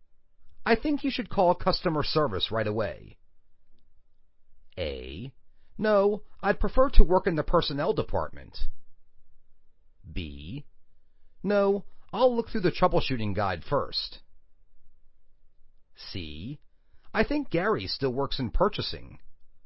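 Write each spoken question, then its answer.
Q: I think you should call customer service right away.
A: B: No, I'll look through the troubleshooting guide first.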